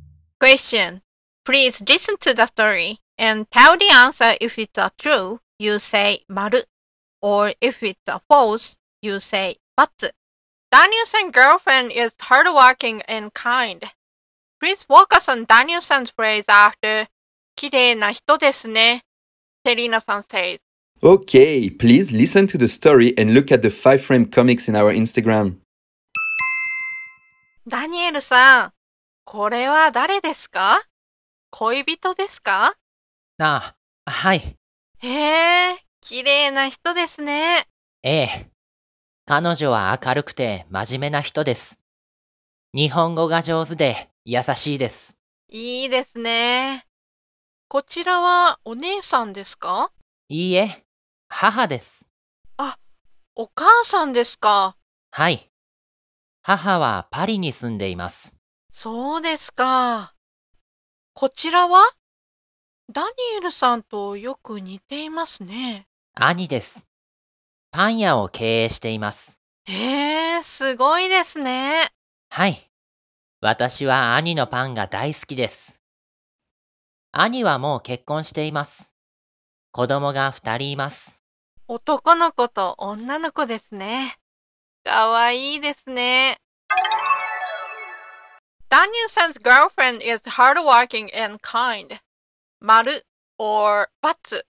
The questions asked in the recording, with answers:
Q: Danielson's girlfriend is hardworking and kind.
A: So the answer is maru.